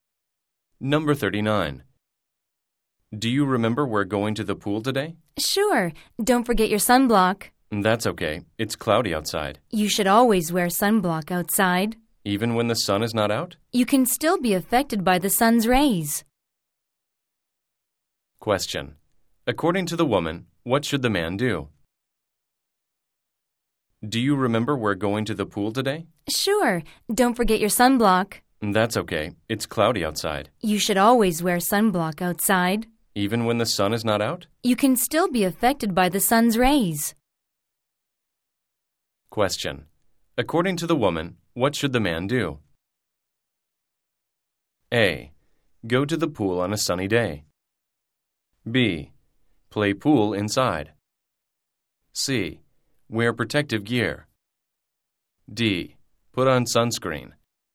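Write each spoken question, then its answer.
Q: According to the woman, what should the man do?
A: D: Put on sunscreen.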